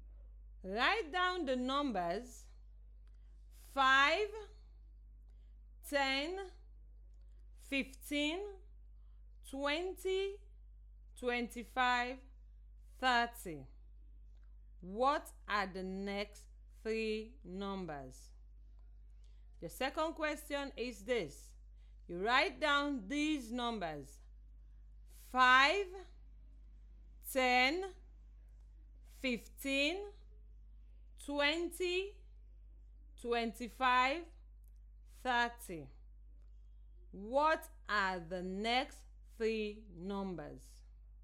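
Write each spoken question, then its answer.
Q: 5, 10, 15, 20, 25, 30. What are the next three numbers?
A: 35, 40, 45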